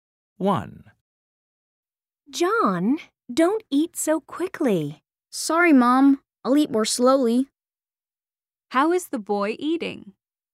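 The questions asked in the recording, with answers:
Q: How is the boy eating?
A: quickly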